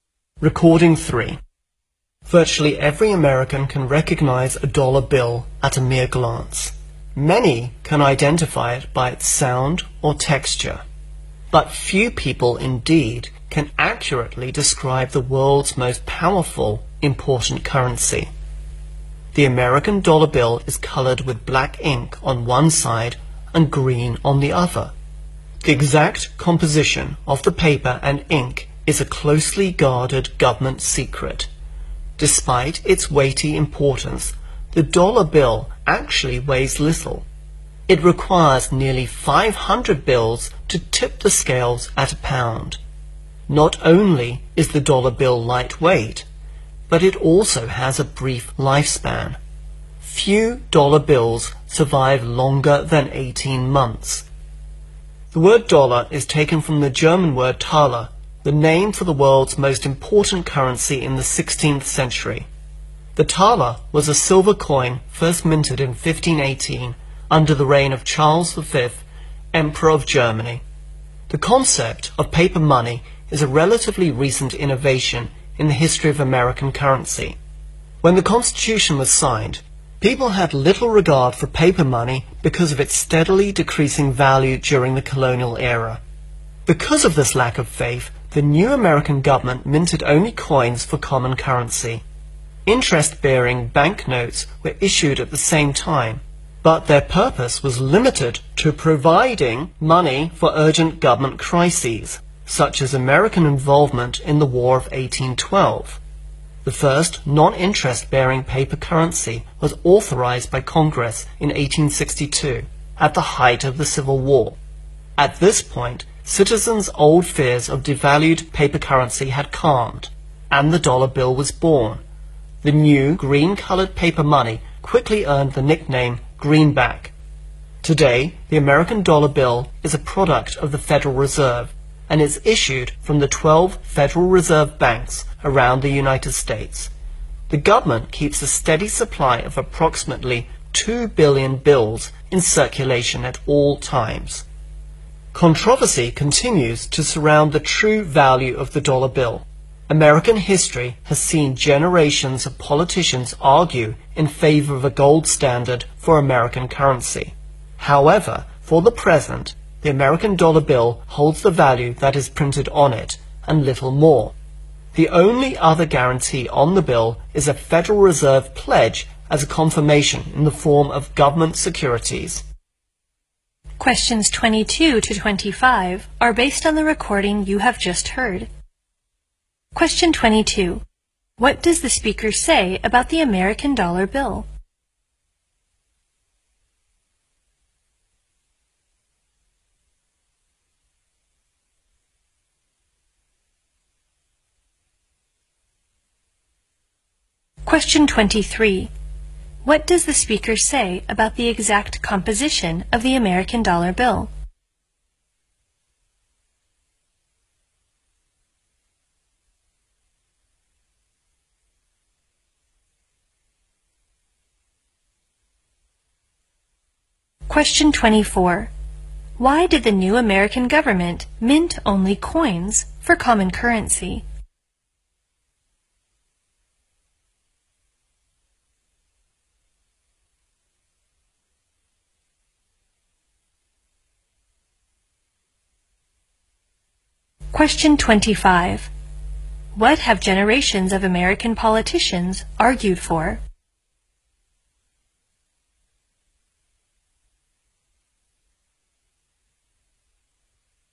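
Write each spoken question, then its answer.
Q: What does the speaker say about the exact composition of the American dollar bill?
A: It is a closely guarded government secret.

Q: Why did the new American government mint only coins for common currency?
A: People had little faith in paper money because its value kept falling.

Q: What have generations of American politicians argued for?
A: A gold standard for American currency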